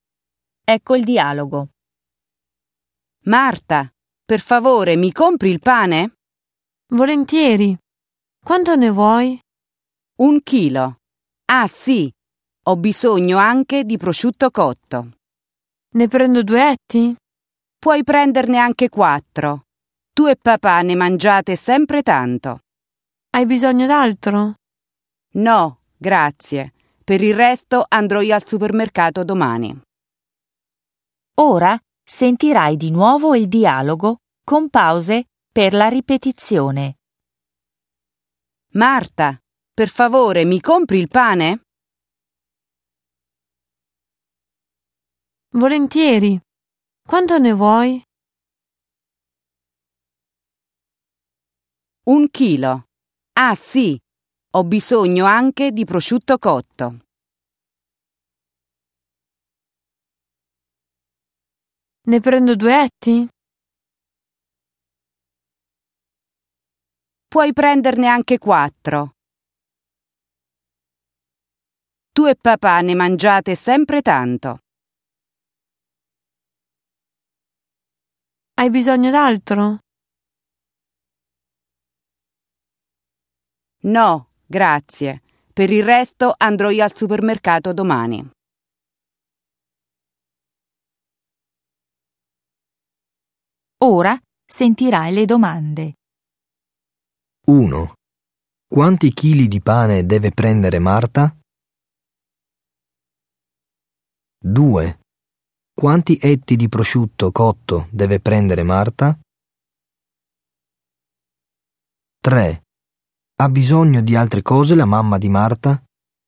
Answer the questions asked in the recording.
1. 1. A.
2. 2. B.
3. 3. B.